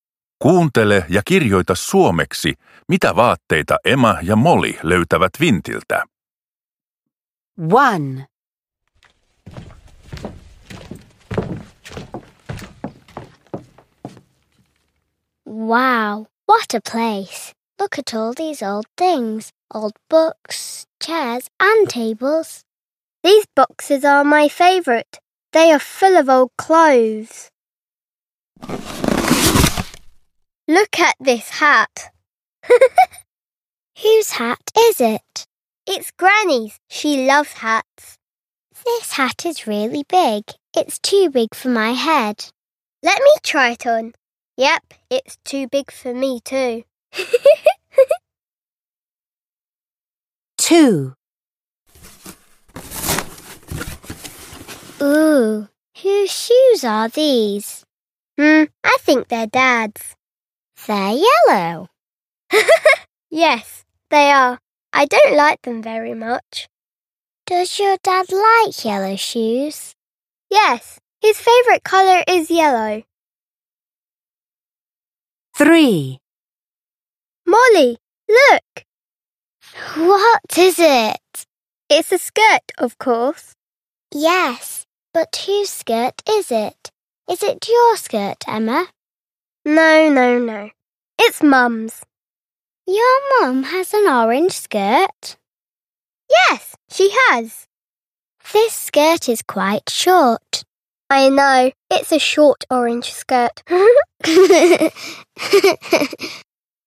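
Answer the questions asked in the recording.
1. hattu (mummon iso hattu)
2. kengät (isän keltaiset kengät)
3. hame (äidin lyhyt oranssi hame)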